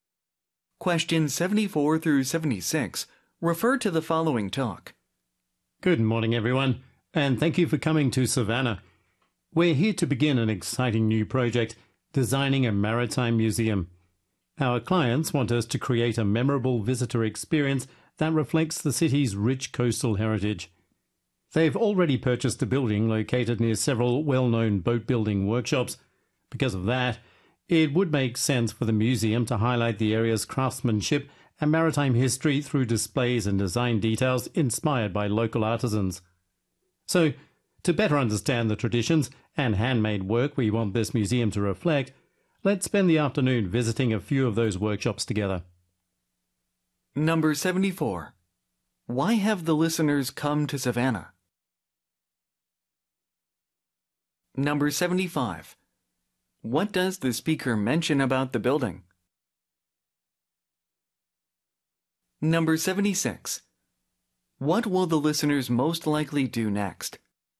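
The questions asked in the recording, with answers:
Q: Why have the listeners come to Savannah?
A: To begin designing a maritime museum

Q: What does the speaker mention about the building?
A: It is near several well-known boat-building workshops

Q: What will the listeners most likely do next?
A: Visit some local boat-building workshops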